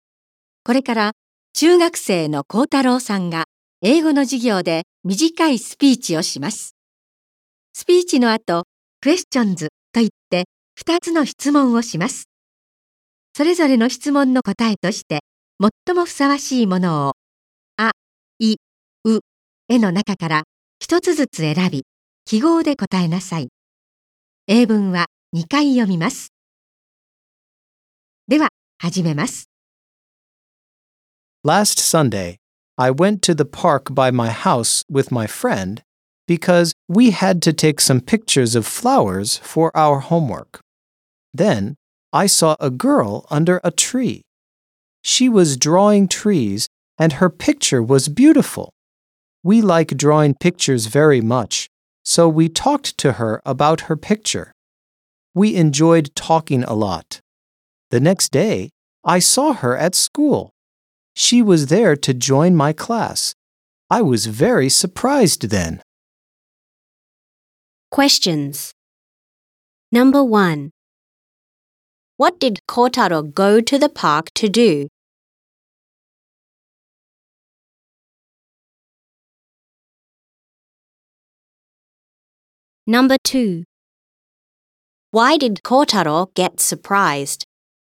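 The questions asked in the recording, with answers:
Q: What did Kotaro go to the park to do?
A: To take pictures of flowers for his homework

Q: Why did Kotaro get surprised?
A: Because the girl he met in the park came to join his class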